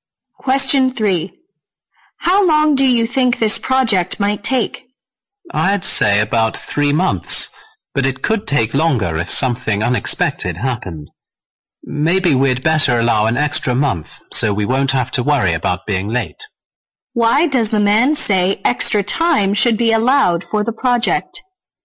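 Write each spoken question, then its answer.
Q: Why does the man say extra time should be allowed for the project?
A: So they won't have to worry about being late if something unexpected happens.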